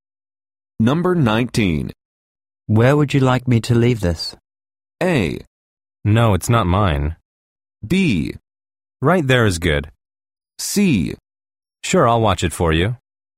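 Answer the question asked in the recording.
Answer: B: Right there is good.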